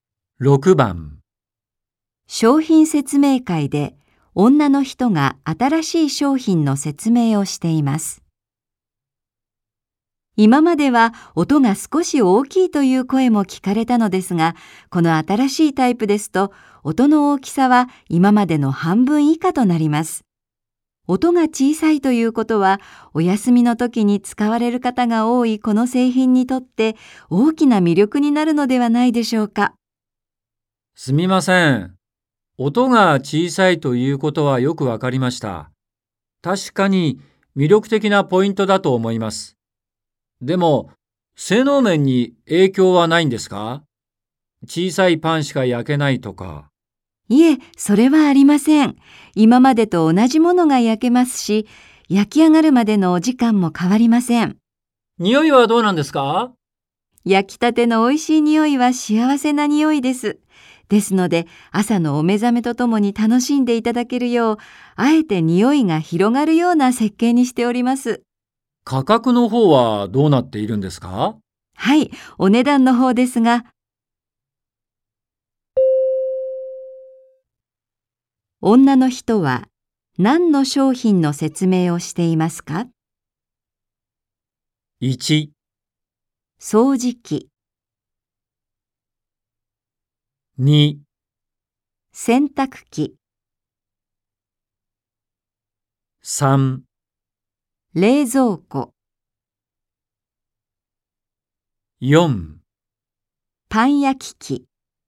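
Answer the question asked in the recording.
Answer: 4: パン焼き器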